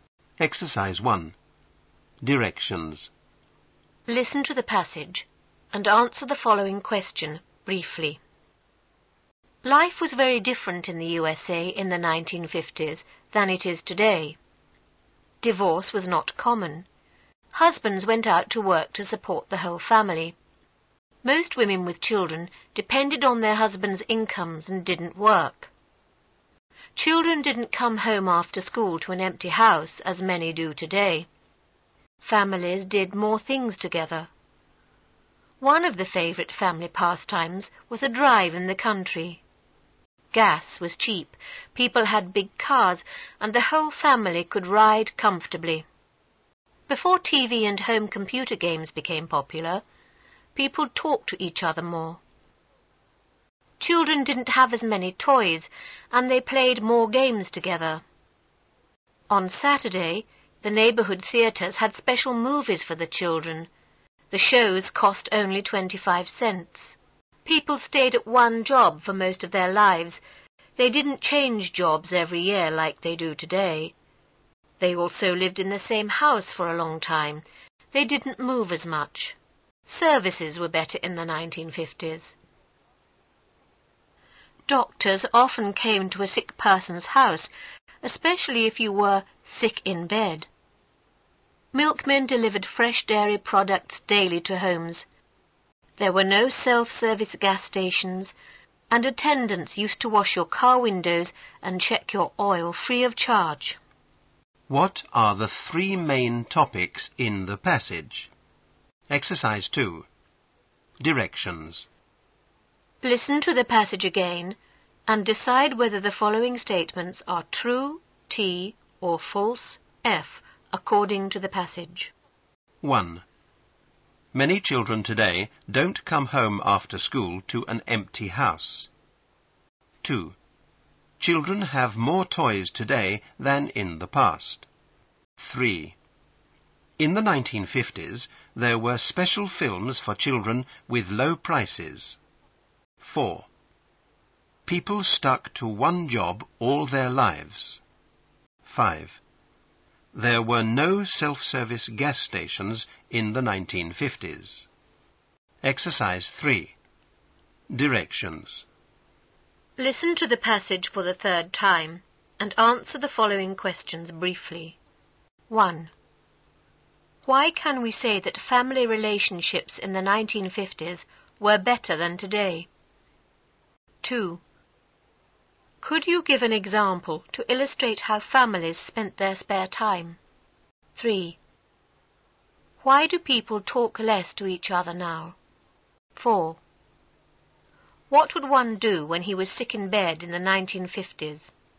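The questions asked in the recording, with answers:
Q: Could you give an example to illustrate how families spent their spare time?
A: A drive in the country

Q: Why do people talk less to each other now?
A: Because of TV and home computer games

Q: What would one do when he was sick in bed in the 1950s?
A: The doctor came to his house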